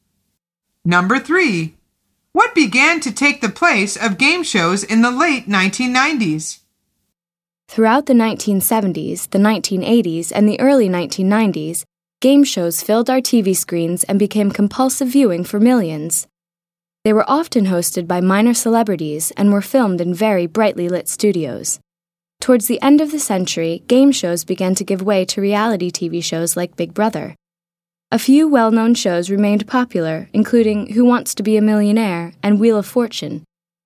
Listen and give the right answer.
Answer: The answer is reality TV.